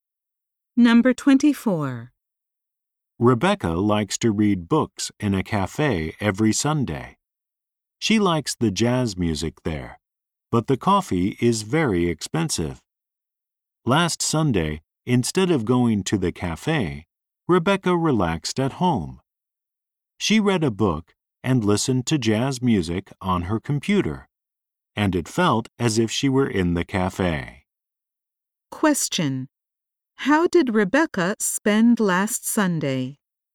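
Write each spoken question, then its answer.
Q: How did Rebecca spend last Sunday?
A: She read a book at home while listening to jazz on her computer.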